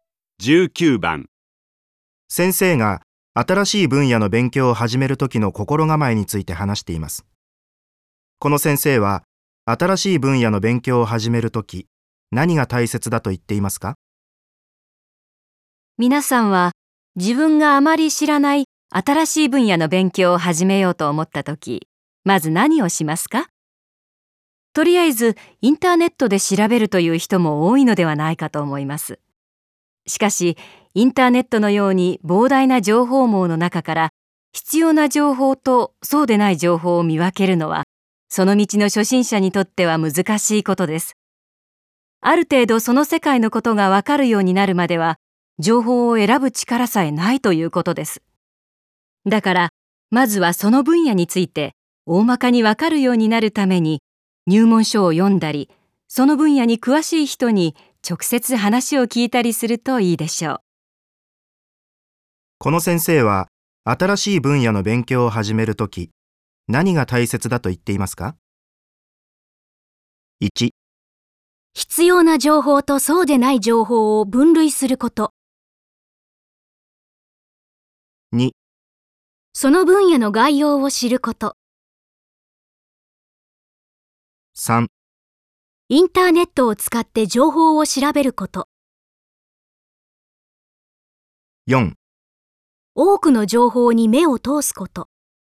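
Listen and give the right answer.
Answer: 2: その分野の概要を知ること。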